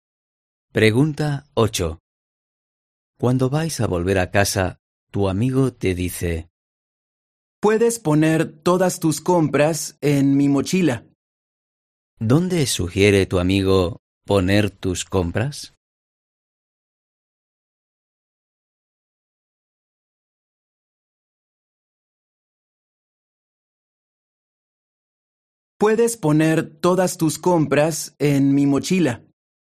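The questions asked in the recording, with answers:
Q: ¿Dónde sugiere tu amigo poner tus compras?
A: en su mochila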